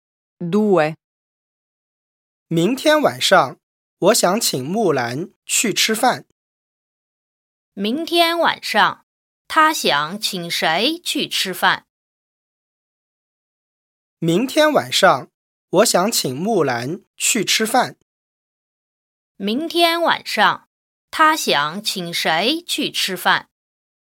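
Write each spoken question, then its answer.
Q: 明天晚上他想请谁去吃饭?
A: 木兰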